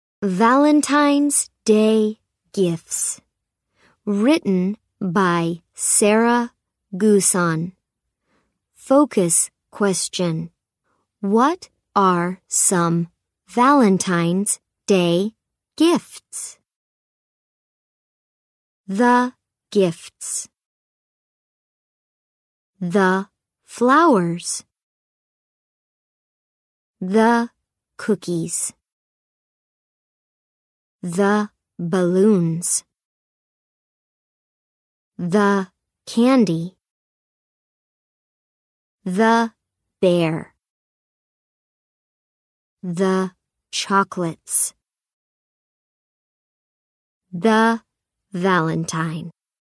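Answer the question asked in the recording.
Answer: Flowers, cookies, balloons, candy, a bear, chocolates and a valentine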